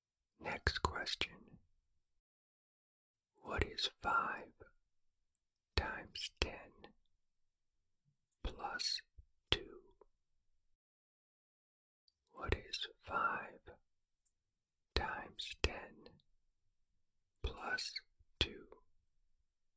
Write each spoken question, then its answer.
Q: What is 5 times 10 plus 2?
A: The answer is 52.